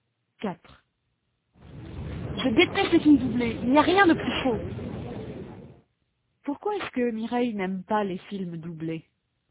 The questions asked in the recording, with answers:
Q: Pourquoi est-ce que Mireille n'aime pas les films doublés ?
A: Parce qu'il n'y a rien de plus faux.